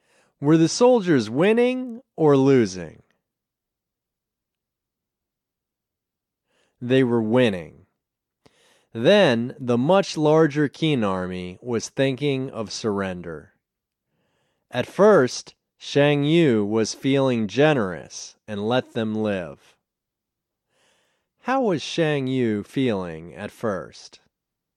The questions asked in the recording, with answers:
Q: How was Shang Yu feeling at first?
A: He was feeling generous at first.